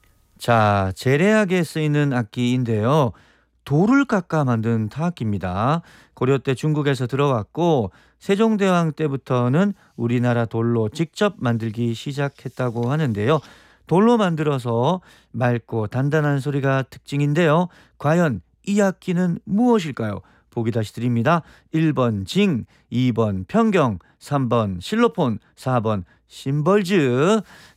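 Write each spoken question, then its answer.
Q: 과연 이 악기는 무엇일까요?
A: 2번: 평경(편경)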